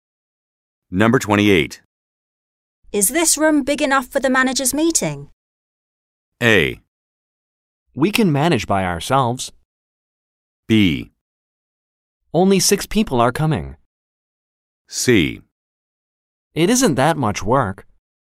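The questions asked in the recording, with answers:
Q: Is this room big enough for the manager's meeting?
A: B: Only 6 people are coming.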